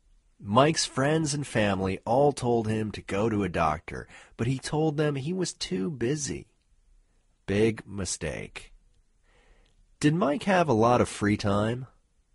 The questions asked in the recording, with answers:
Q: Did Mike have a lot of free time?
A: No, Mike didn't have a lot of free time.